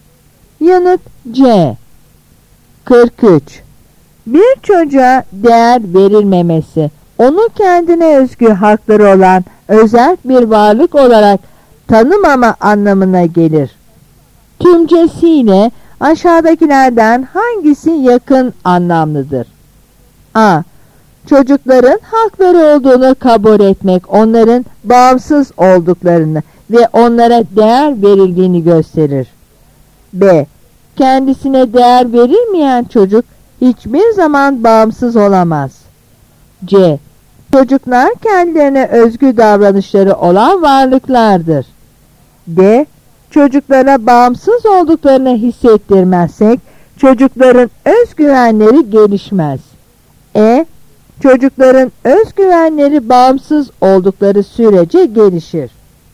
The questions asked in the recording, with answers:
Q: Tümcesiyle aşağıdakilerden hangisi yakın anlamlıdır?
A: Yanıt A.